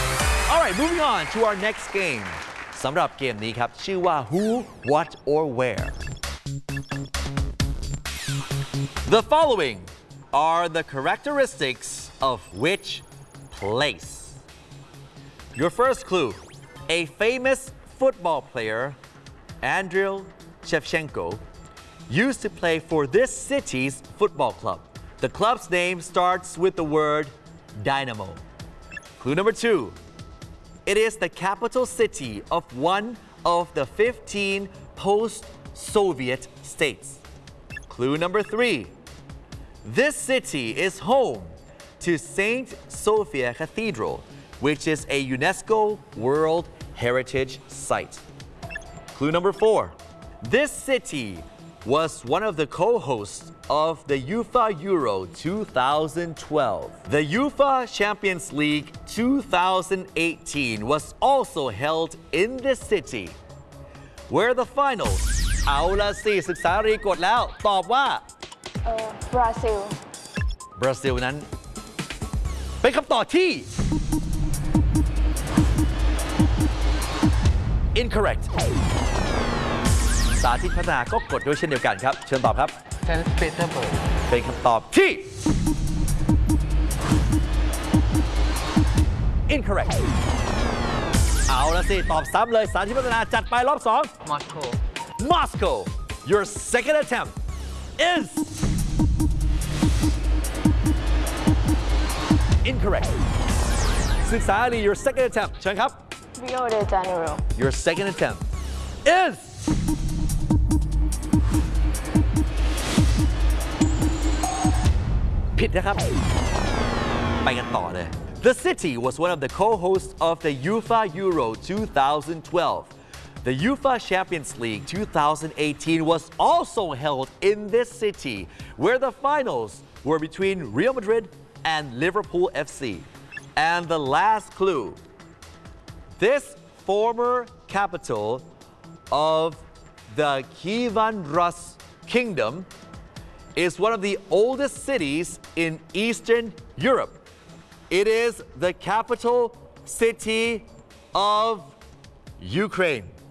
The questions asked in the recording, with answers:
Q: The following are the characteristics of which place?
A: The city name is Kiev.